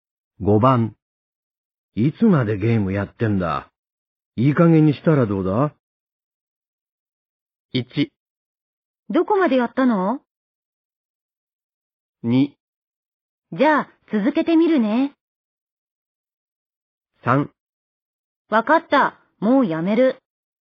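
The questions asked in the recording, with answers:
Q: いつまでゲームやってんだ。いい加減にしたらどうだ?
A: 3: わかった、もうやめる。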